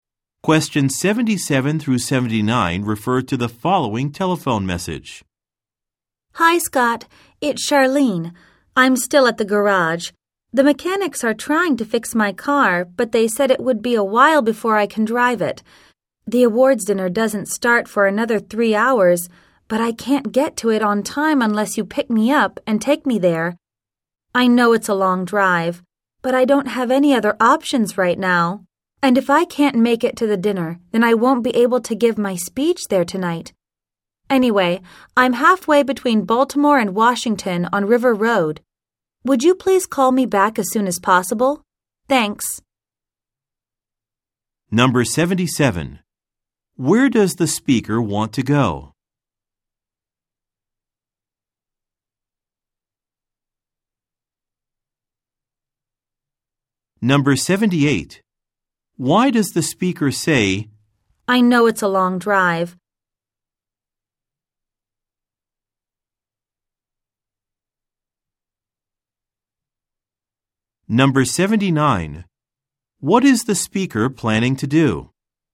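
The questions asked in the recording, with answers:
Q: Where does the speaker want to go?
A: To an awards dinner

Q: What is the speaker planning to do?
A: Give a speech at the awards dinner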